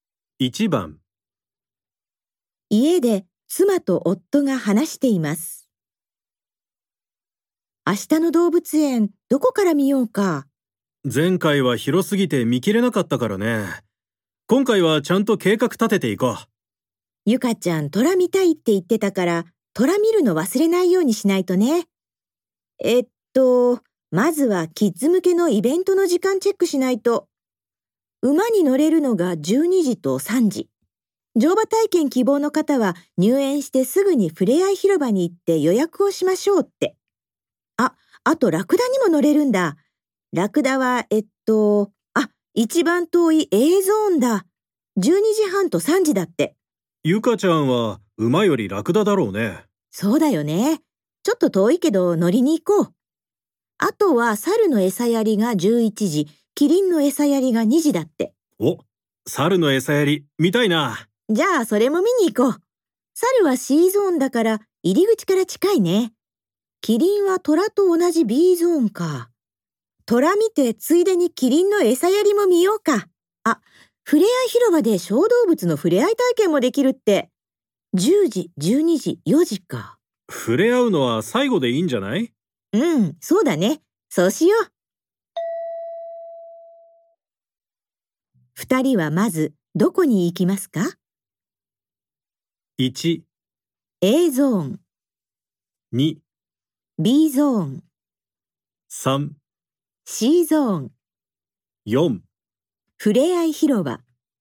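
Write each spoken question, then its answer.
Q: 二人はまずどこに行きますか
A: 3: C ゾーン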